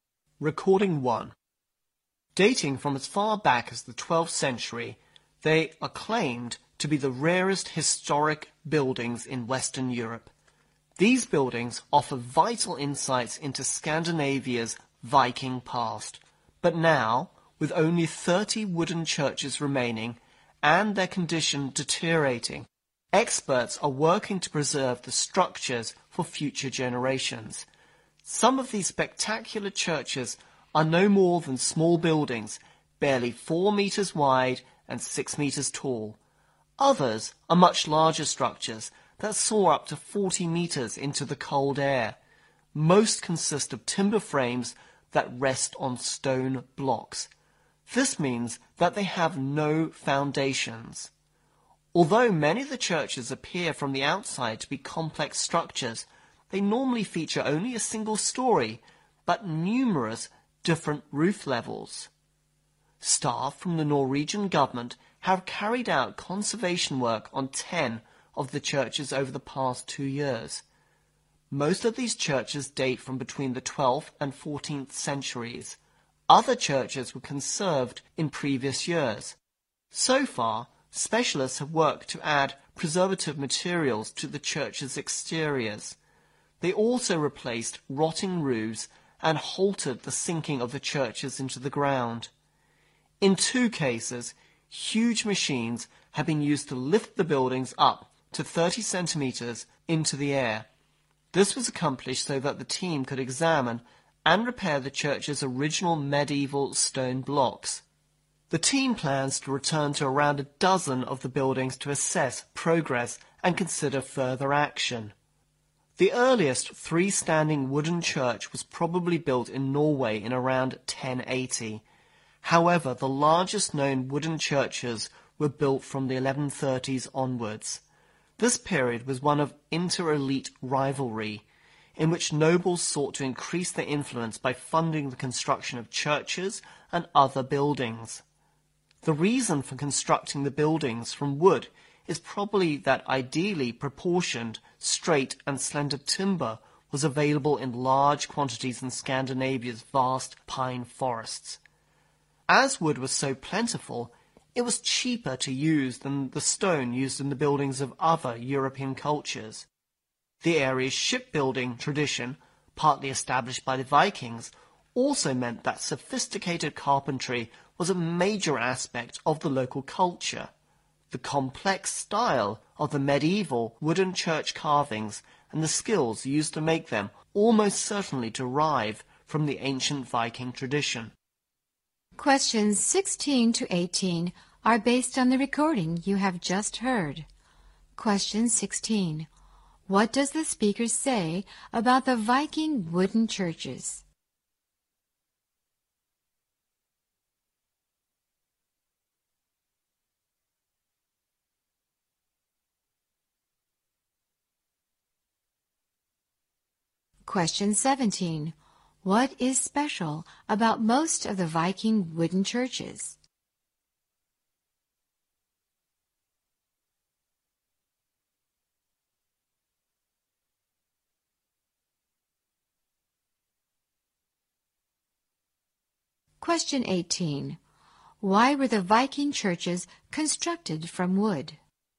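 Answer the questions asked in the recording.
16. They are the rarest historic buildings in Western Europe, and only 30 remain, deteriorating
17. They have no foundations; timber frames rest on stone blocks
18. Suitable timber was plentiful and cheaper than stone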